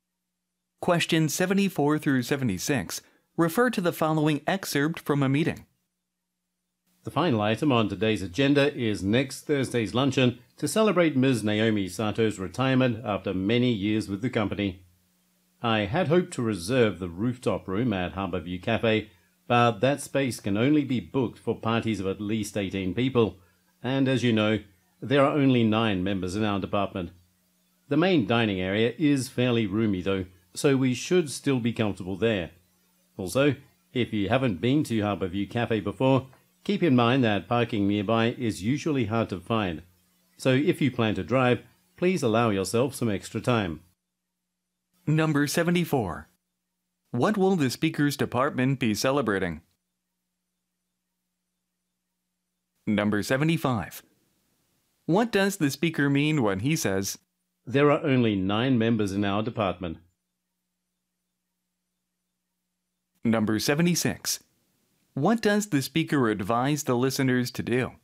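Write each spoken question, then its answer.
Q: What will the speaker's department be celebrating?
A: Naomi Sato's retirement

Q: What does the speaker mean when he says,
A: The group is too small to book the rooftop room

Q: What does the speaker advise the listeners to do?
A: Allow extra time if driving, because parking is hard to find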